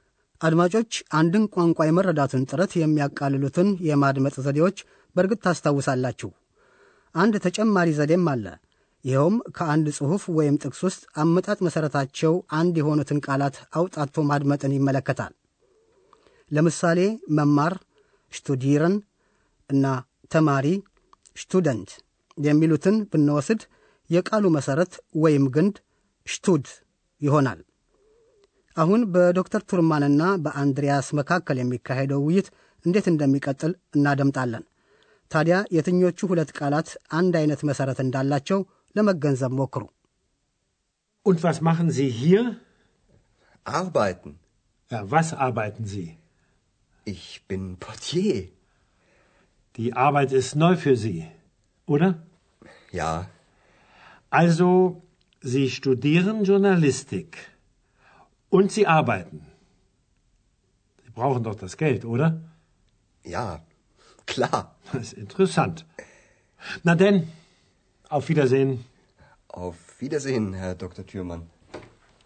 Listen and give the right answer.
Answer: ሁለቱ ተመሳሳይ መሰረት ያላቸው ቃላት መስራት እና ሥራ ናቸው እና ግንዳቸው ደግሞ አርባየት ይሆናል ማለት ነው።